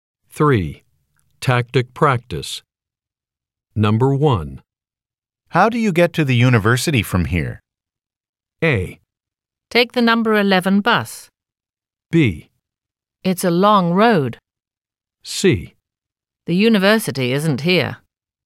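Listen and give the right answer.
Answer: A: Take the number 11 bus.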